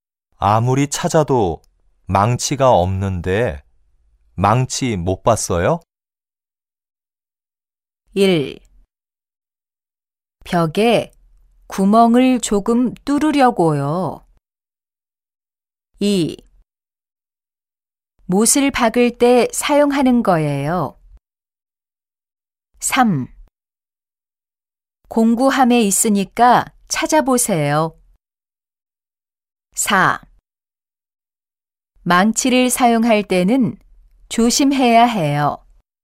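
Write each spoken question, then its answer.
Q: 아무리 찾아도 망치가 없는데 망치 못 봤어요?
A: 3: 공구함에 있으니까 찾아보세요.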